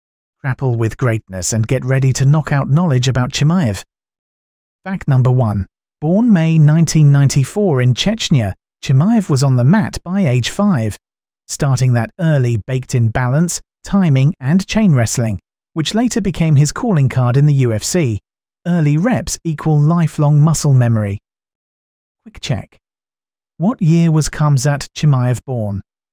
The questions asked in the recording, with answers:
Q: What year was Khamzat Chimaev born?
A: 1994.